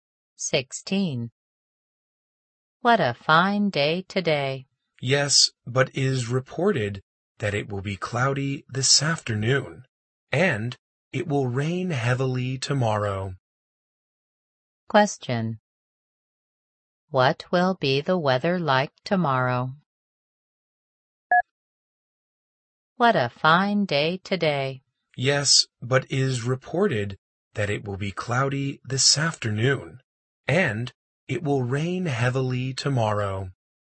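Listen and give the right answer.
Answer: Rainy (it will rain heavily)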